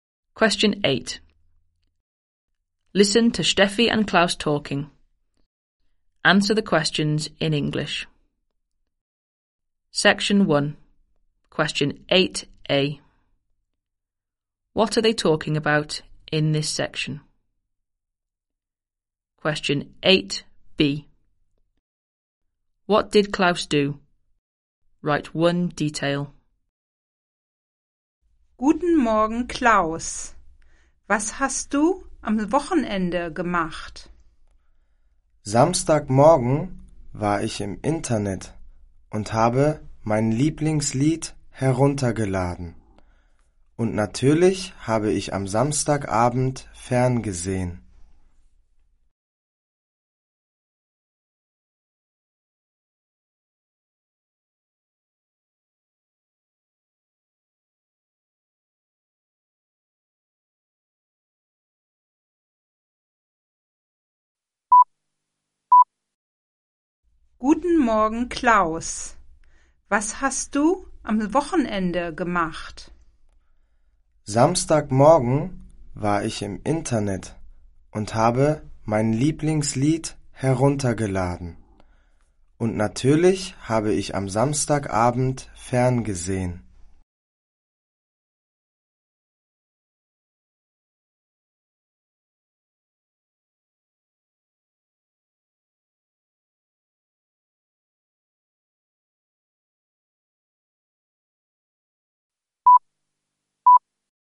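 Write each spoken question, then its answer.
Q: What are they talking about in this section?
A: What they did at the weekend

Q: What did Klaus do?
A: Downloaded his favourite song / watched TV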